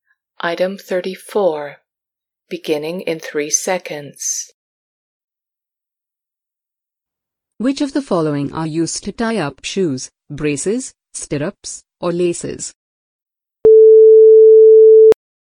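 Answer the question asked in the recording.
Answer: laces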